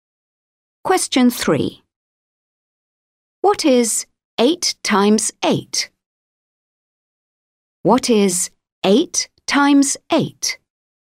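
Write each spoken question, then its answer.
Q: What is 8 times 8?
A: 64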